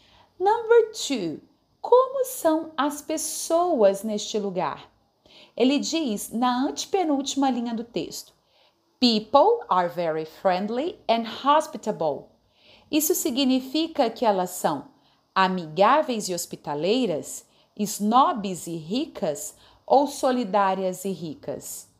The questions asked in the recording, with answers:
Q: Como são as pessoas neste lugar?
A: Então, na questão 2, a letra A é a alternativa correta.